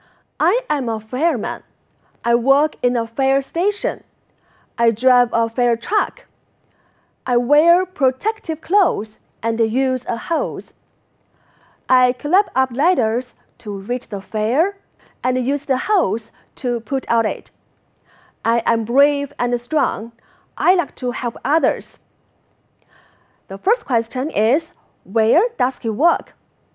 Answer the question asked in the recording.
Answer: He works in a fire station.